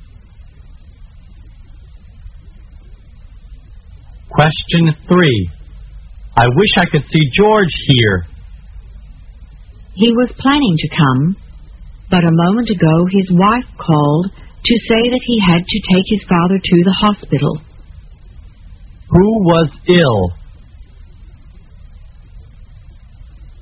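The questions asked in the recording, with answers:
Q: Who was ill?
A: George's father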